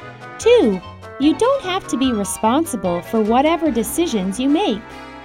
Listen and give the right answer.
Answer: False. You have to be responsible for whatever decisions you make.